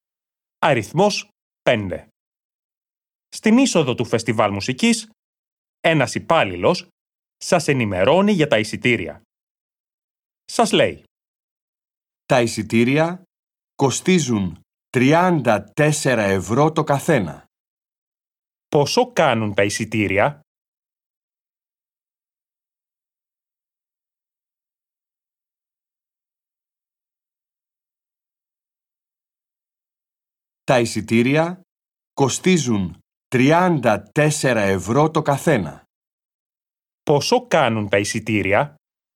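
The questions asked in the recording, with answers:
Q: Πόσο κάνουν τα εισιτήρια?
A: 34 ευρώ το καθένα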